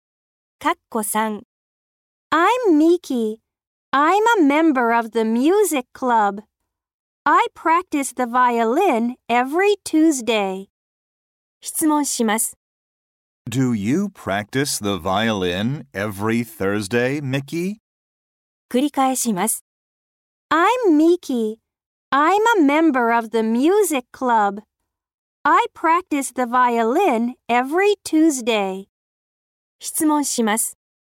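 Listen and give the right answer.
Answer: No, I don't. (Every Tuesday.)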